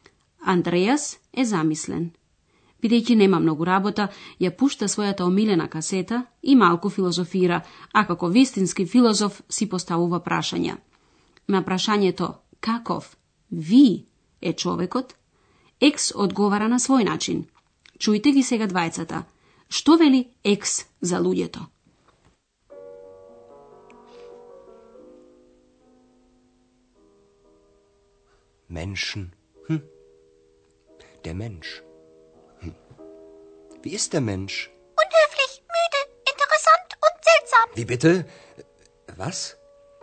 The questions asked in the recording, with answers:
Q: Што вели X за луѓето?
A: Екс ги набројува сите можни одлики од неучтиво до чудно.